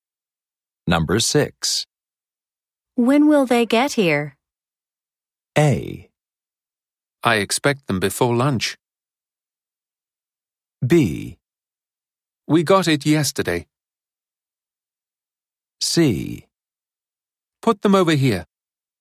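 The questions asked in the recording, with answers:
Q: When will they get here?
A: A: I expect them before lunch.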